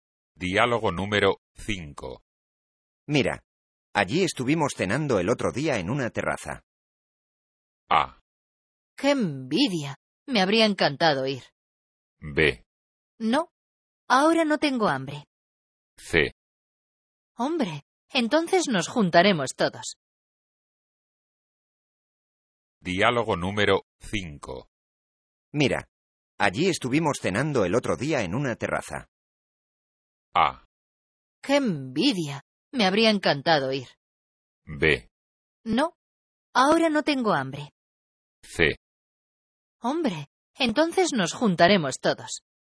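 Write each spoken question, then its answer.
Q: Mira, allí estuvimos cenando el otro día en una terraza.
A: A: ¡Qué envidia! Me habría encantado ir.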